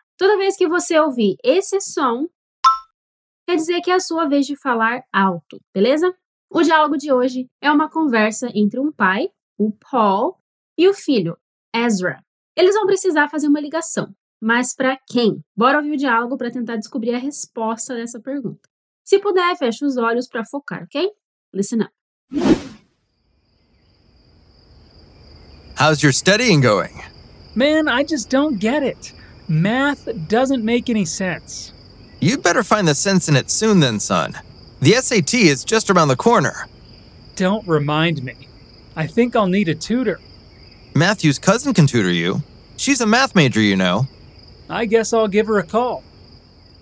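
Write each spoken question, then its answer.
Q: Eles vão precisar fazer uma ligação. mas para quem?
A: Para a prima do Matthew, que estuda matemática (para ser tutora do Ezra)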